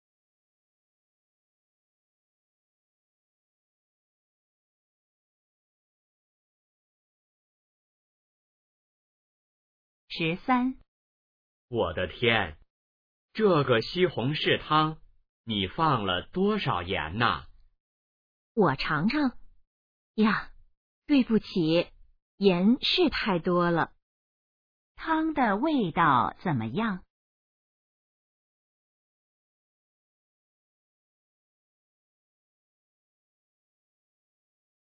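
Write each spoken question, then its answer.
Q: 汤的味道怎么样?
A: 太咸了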